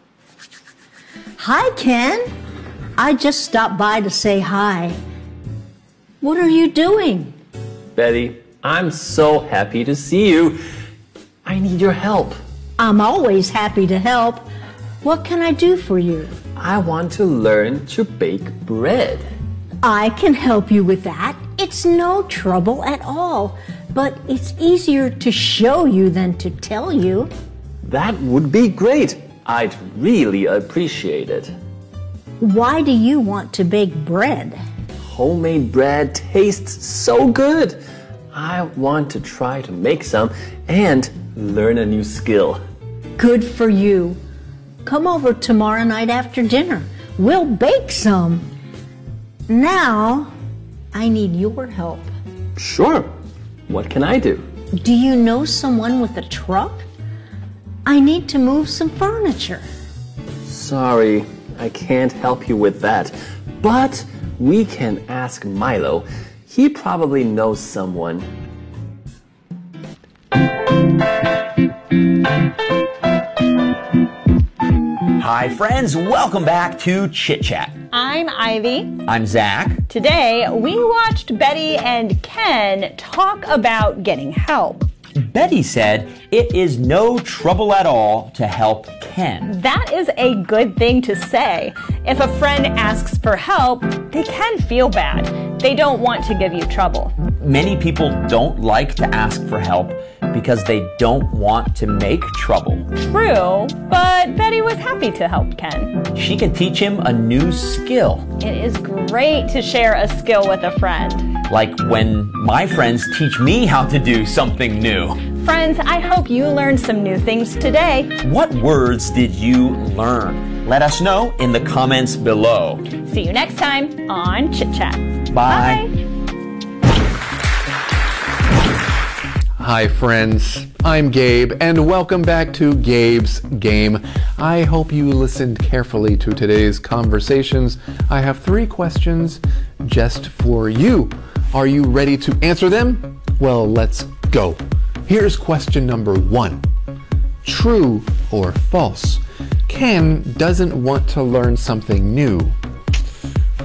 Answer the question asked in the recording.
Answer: So if you said false, you're correct.